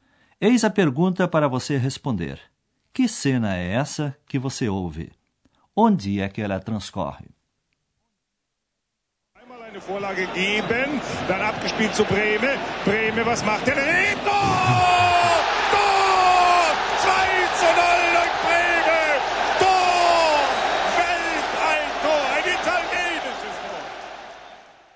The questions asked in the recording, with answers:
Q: Que cena é essa que você ouve?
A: Não foi difícil perceber que se trata de uma cena de esporte, ou, para sermos mais exatos, de uma partida de futebol num estádio.

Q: Onde é que ela transcorre?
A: de uma partida de futebol num estádio.